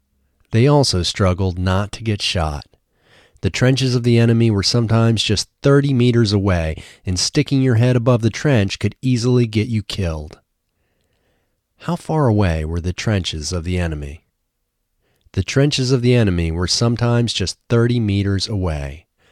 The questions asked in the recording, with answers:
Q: How far away were the trenches of the enemy?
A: The trenches of the enemy were sometimes just 30 meters away.